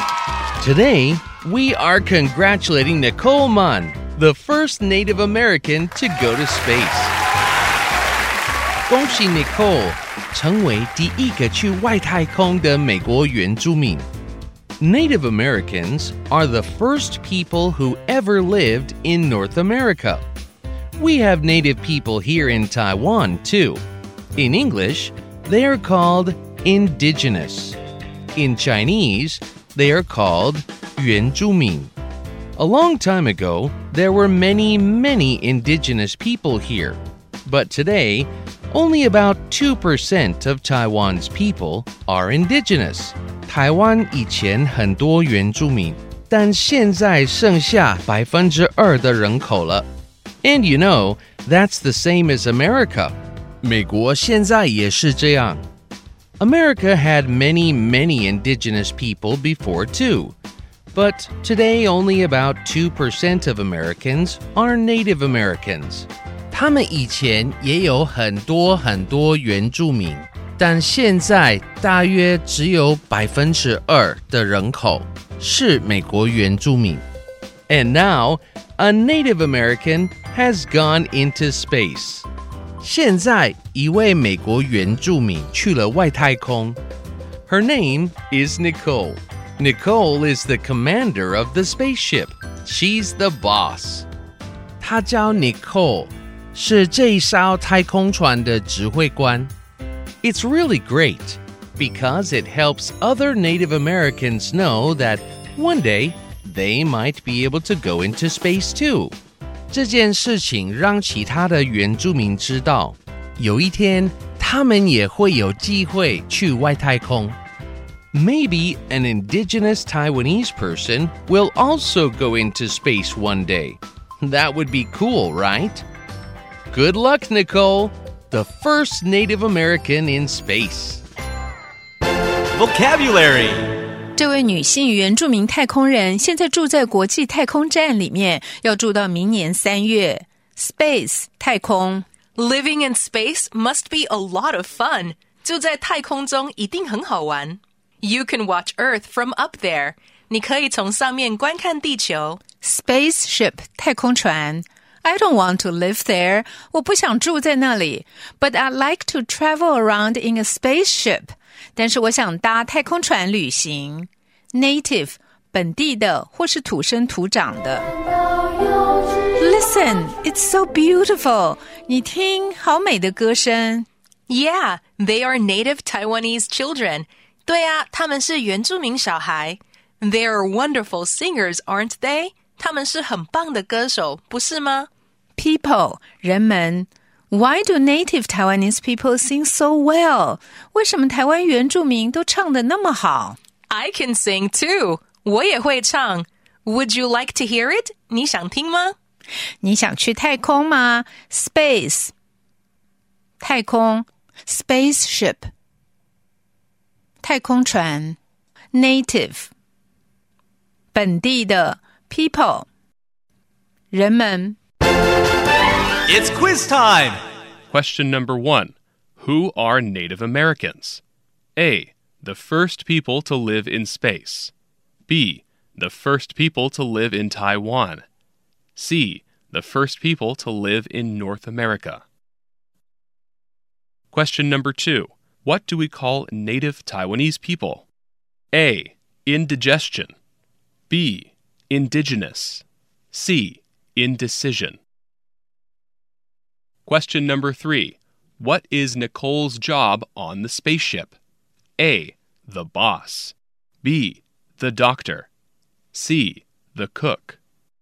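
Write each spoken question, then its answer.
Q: Who are Native Americans?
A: C: The first people to live in North America.

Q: What do we call Native Taiwanese people?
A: B: Indigenous.

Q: What is Nicole's job on the spaceship?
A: A: The boss.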